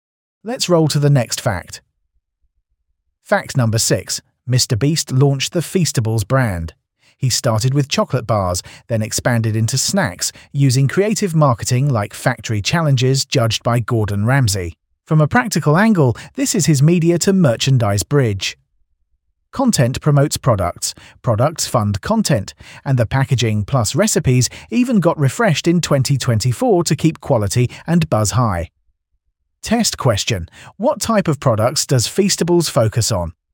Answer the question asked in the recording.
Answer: Correct answer. Chocolate and snacks.